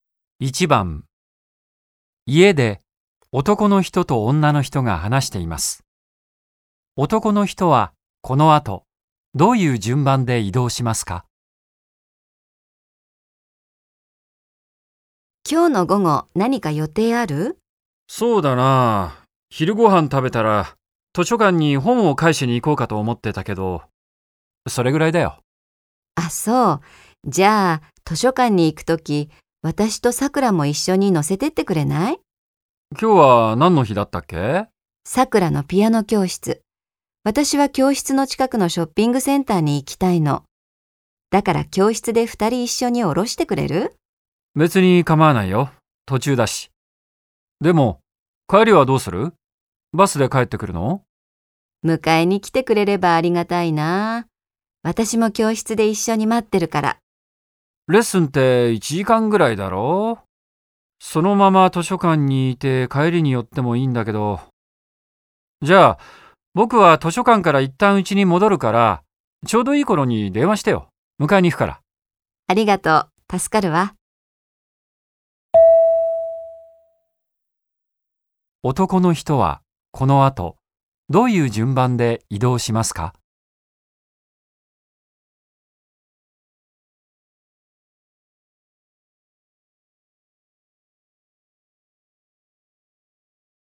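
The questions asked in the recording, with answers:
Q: 男の人はこの後、どういう順番で移動しますか?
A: 家→ピアノ教室→図書館→家→ピアノ教室→家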